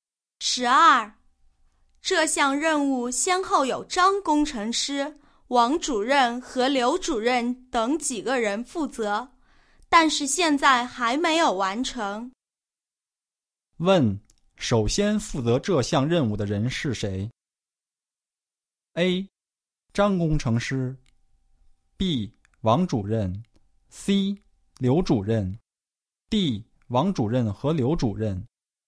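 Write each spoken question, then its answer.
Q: 问:首先负责这项任务的人是谁?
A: A: 张工程师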